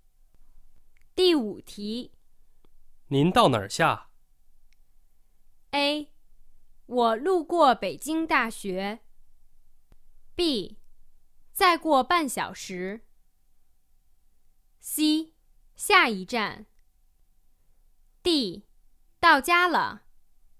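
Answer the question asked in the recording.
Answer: C: 下一站。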